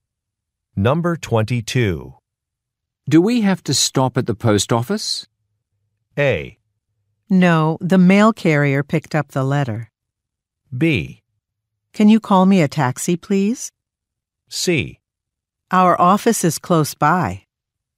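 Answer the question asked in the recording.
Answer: A: No, the mail carrier picked up the letter.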